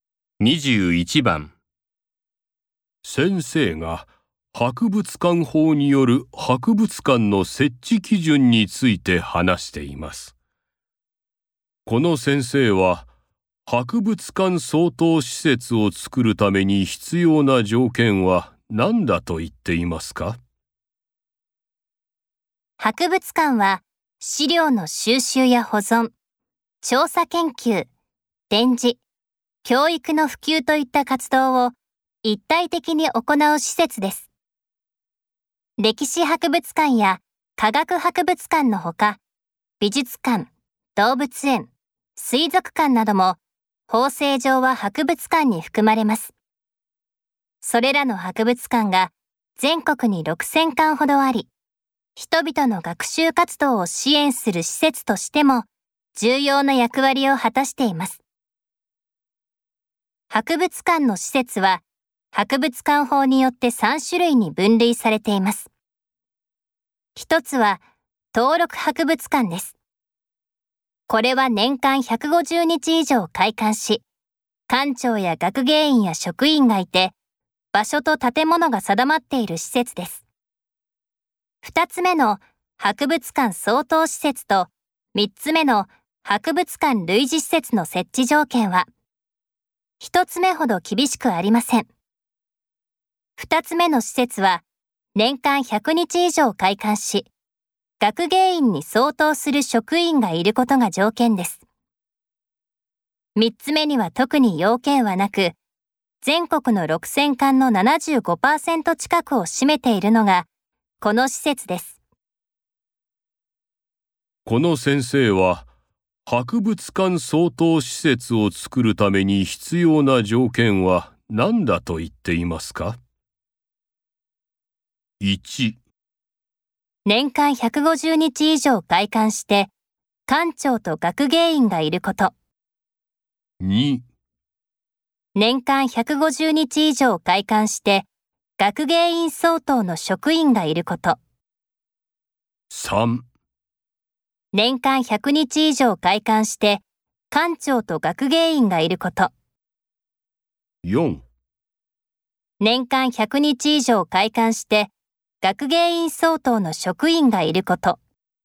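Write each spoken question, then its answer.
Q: この先生は、博物館相当施設を作るために必要な条件は何だと言っていますか?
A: 4: 年間100日以上開館して、学芸員相当の職員がいること。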